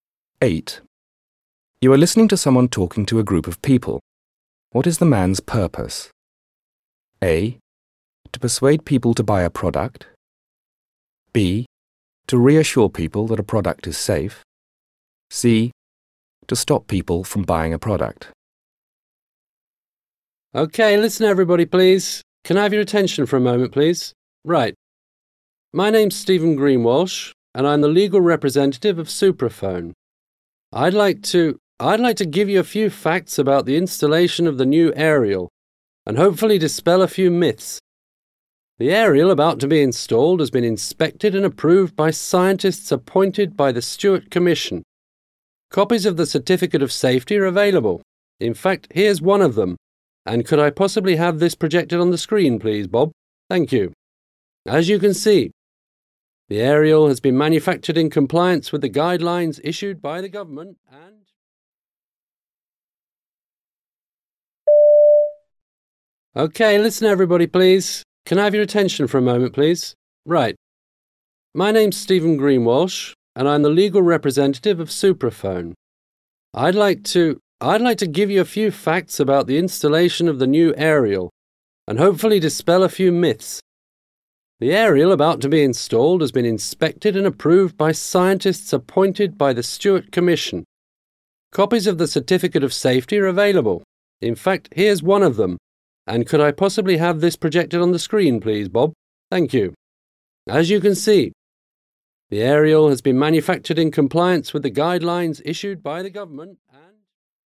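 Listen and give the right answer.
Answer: B: To reassure people that a product is safe.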